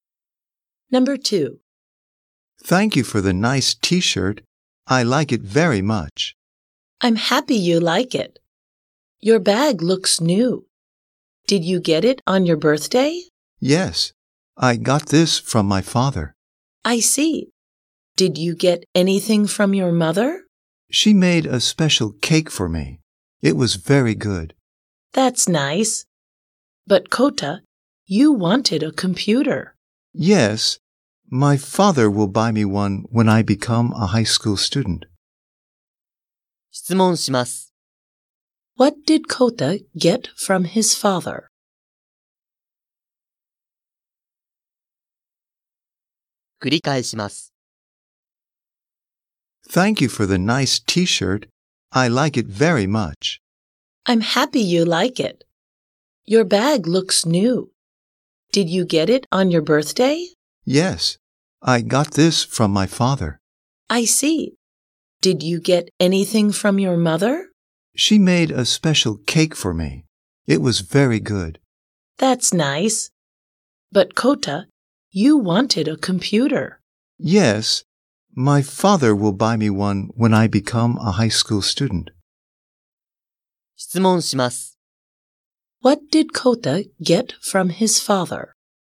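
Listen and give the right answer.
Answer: A bag.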